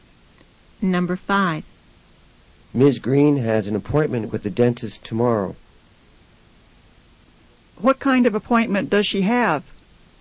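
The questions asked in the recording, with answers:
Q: What kind of appointment does she have?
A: A dentist appointment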